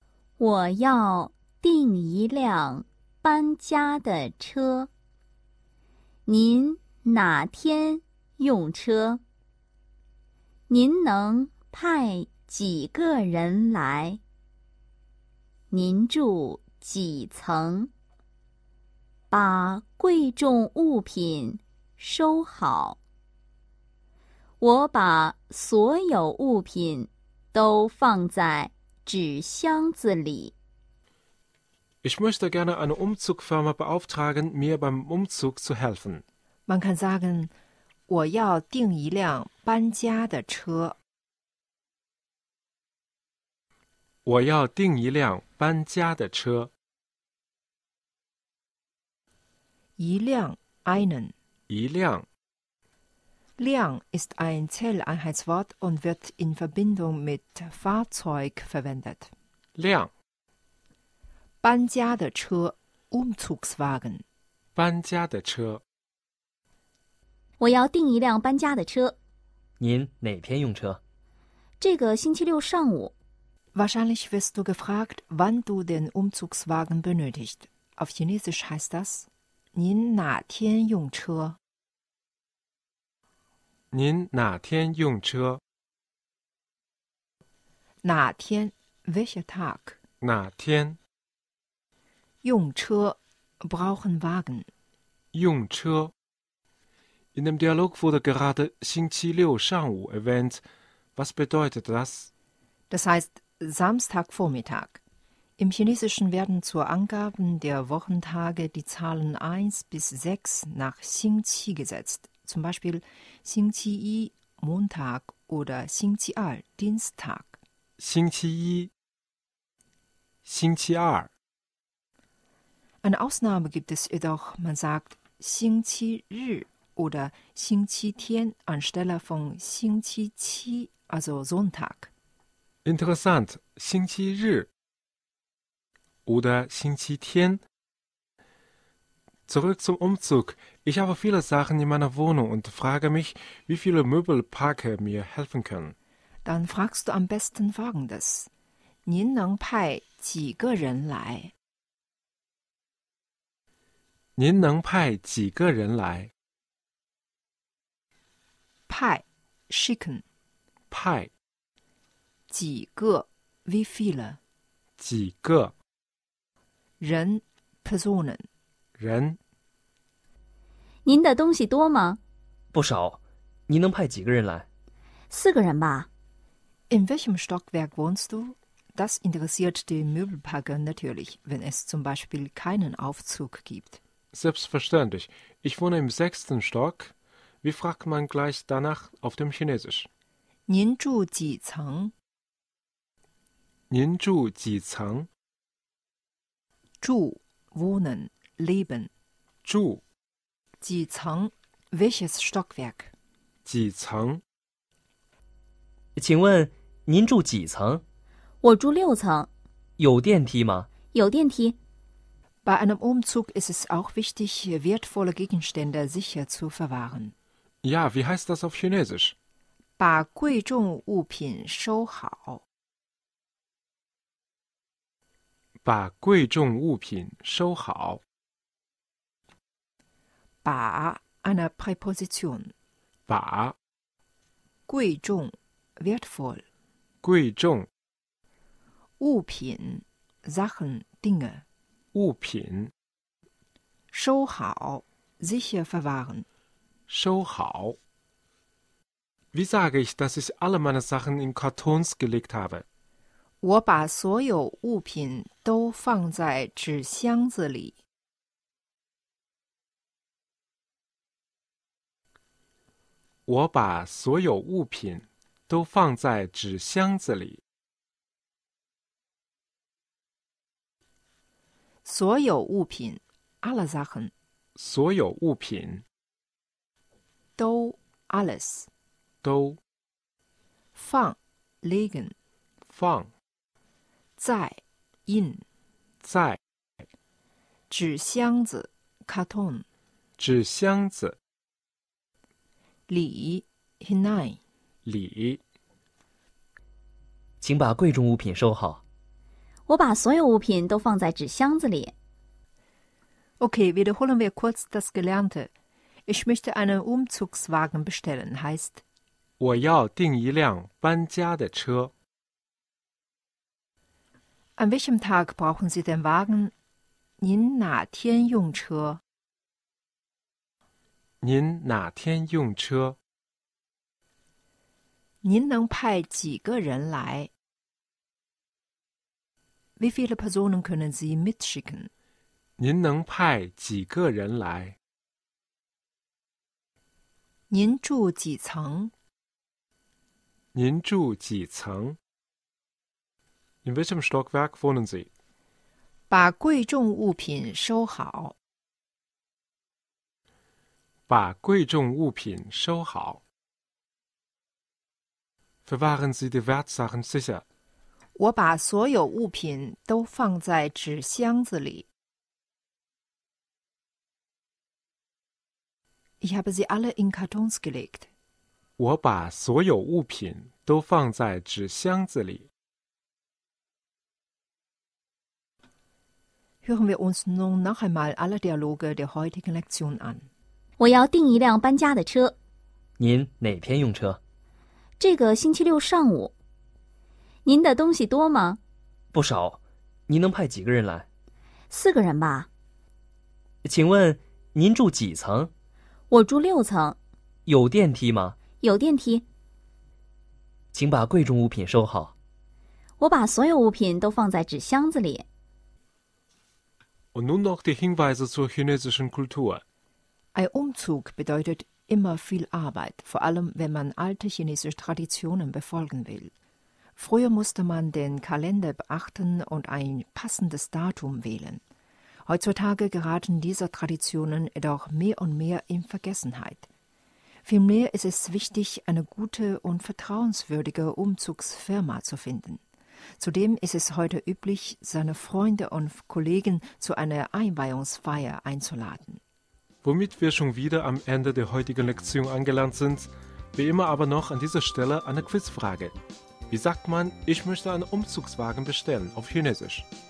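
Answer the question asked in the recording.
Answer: 我要订一辆搬家的车。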